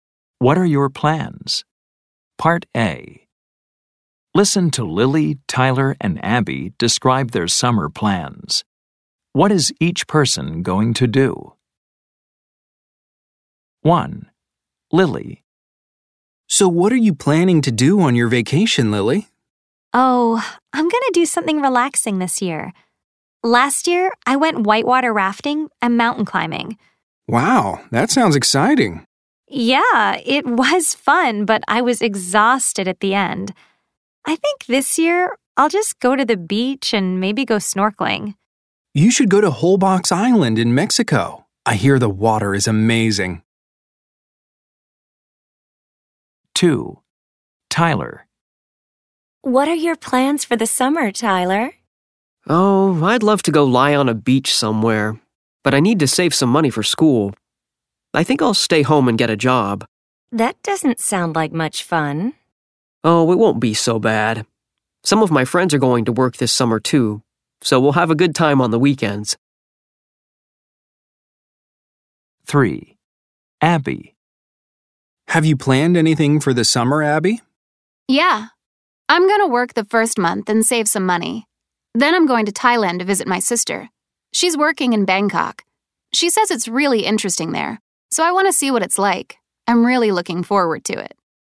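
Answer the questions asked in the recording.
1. Go to the beach and maybe go snorkeling
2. Stay home and get a job
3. Work the first month, then go to Thailand to visit her sister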